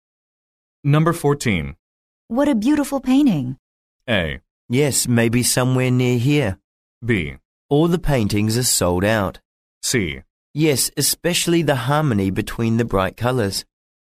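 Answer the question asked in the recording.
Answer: C: Yes, especially the harmony between the bright colors.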